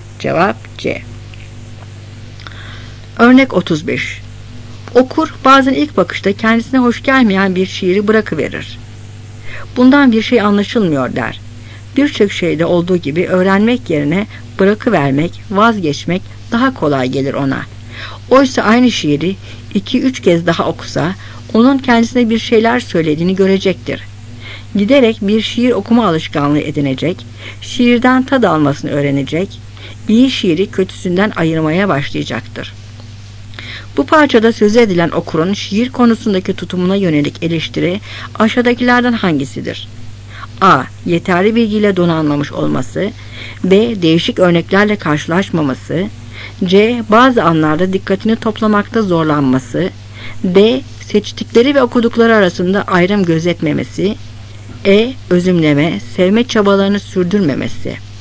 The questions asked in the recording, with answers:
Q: Bu parçada söz edilen okurun şiir konusundaki tutumuna yönelik eleştiri aşağıdakilerden hangisidir?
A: Cevap E.